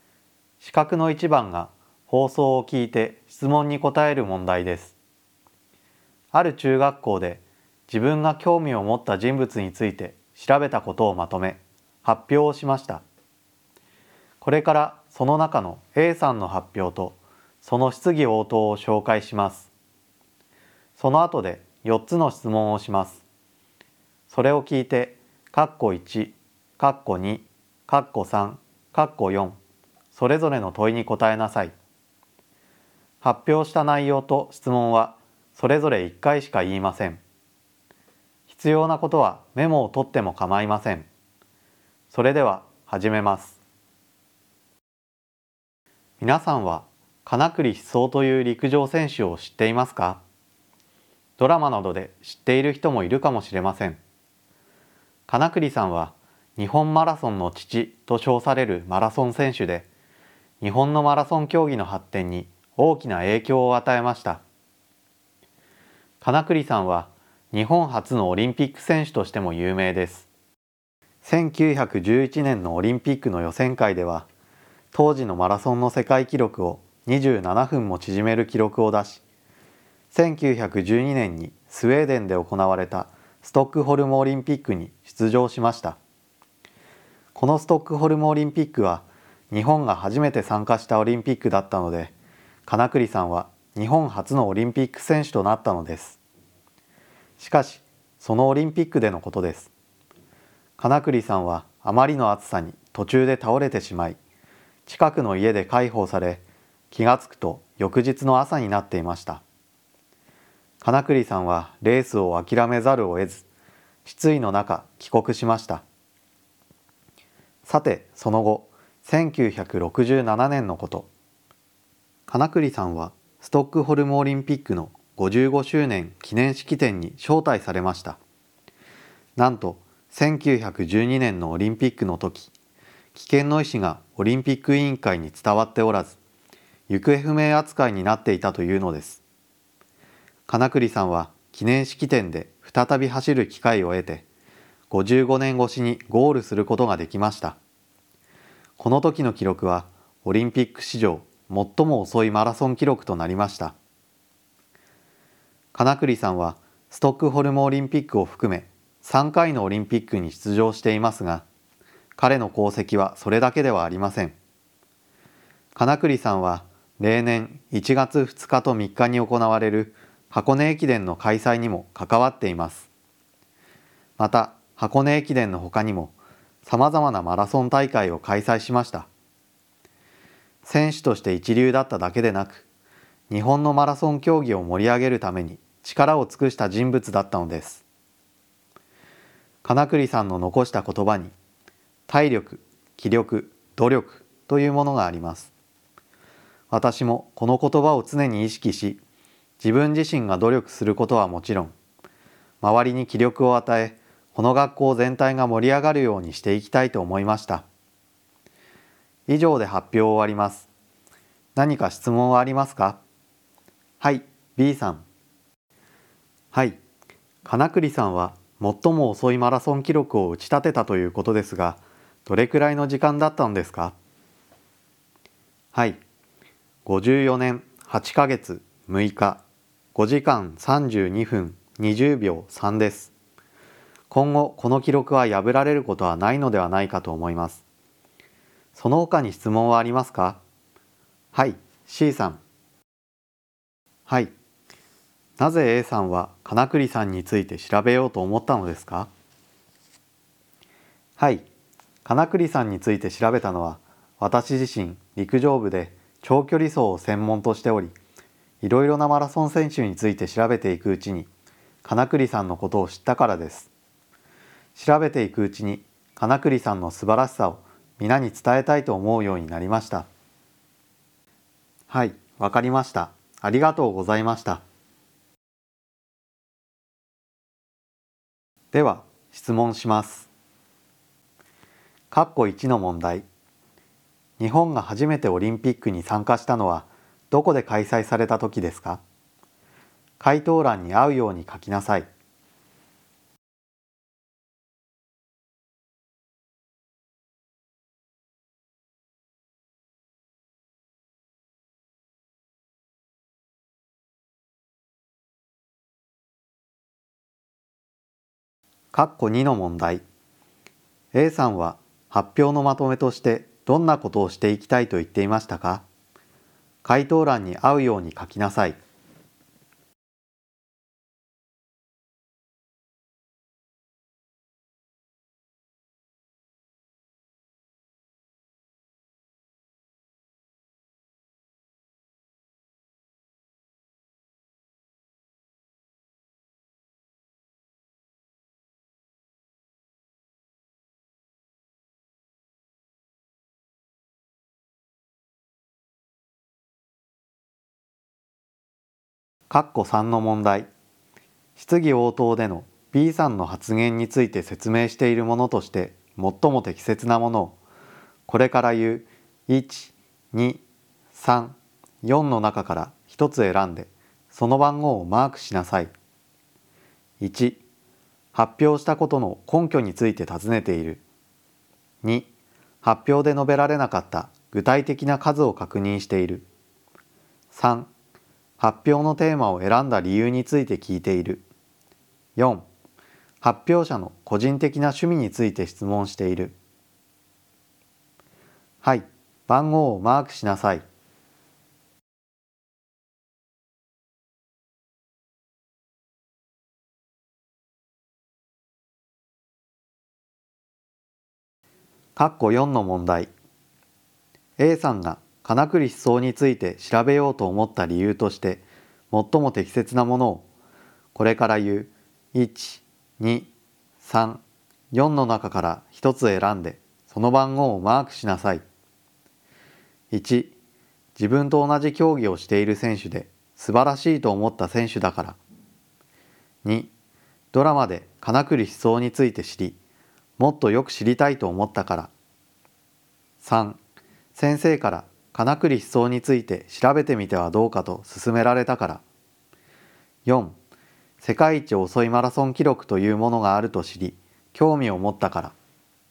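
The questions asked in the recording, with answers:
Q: 日本が初めてオリンピックに参加したのはどこで開催された時ですか?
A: スウェーデンのストックホルム(1912年ストックホルムオリンピック)

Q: A さんは発表のまとめとしてどんなことをしていきたいと言っていましたか?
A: 体力・気力・努力を意識して自分が努力し、周りに気力を与えて学校全体を盛り上げていきたい

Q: 質疑応答での B さんの発言について説明しているものとして最も適切なものを、これから言う1、2、3、4の中から1つ選んで、その番号をマークしなさい。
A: 2: 発表で述べられなかった具体的な数を確認している。

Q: A さんが金栗思想について調べようと思った理由として最も適切なものを、これから言う1、2、3、4の中から一つ選んでその番号をマークしなさい。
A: 1: 自分と同じ競技をしている選手で素晴らしいと思った選手だから。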